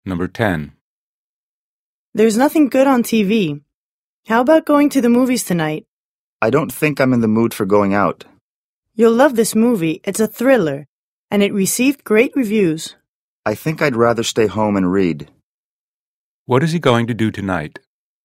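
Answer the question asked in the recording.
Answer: Stay home and read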